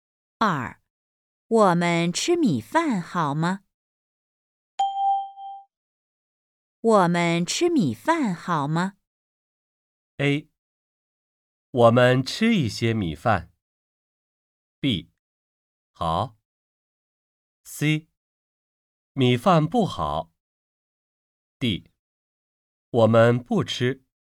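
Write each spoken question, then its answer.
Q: 我们吃米饭好吗?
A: B: 好。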